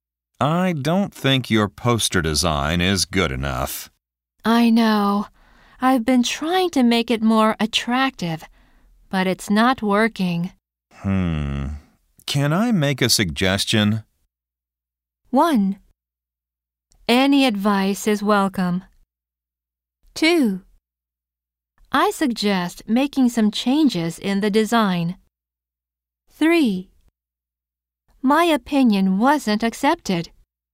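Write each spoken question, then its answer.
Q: Can I make a suggestion?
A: 1: Any advice is welcome.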